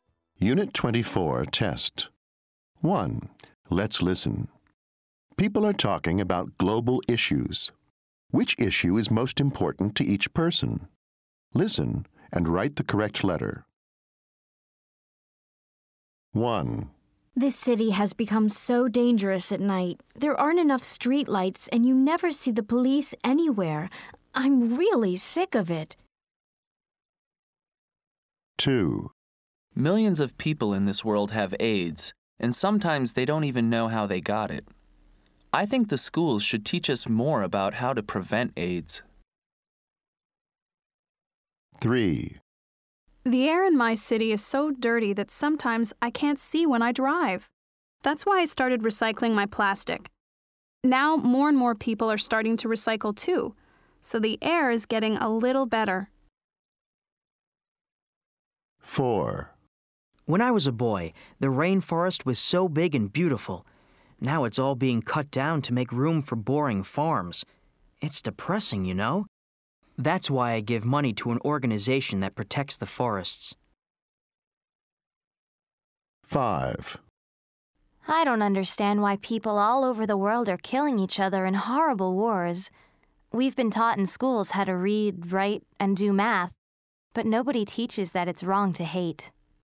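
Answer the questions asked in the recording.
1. crime / safety
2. AIDS
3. air pollution
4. deforestation (rainforest destruction)
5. war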